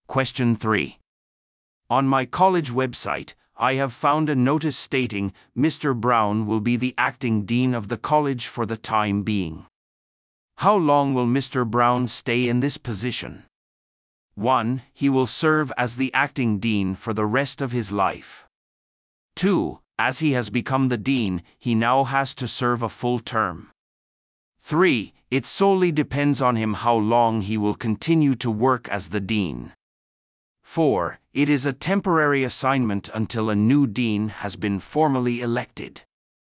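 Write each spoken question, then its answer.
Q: How long will Mr. Brown stay in this position?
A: 4: It is a temporary assignment until a new dean has been formally elected.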